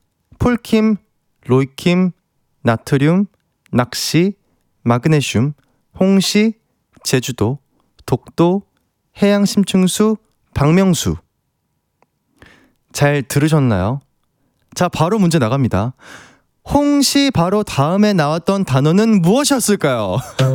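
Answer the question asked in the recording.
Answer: 제주도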